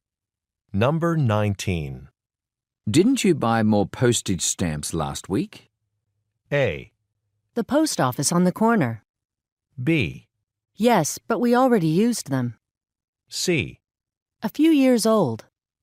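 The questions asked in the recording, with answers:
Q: Didn't you buy more postage stamps last week?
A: B: Yes, but we already used them.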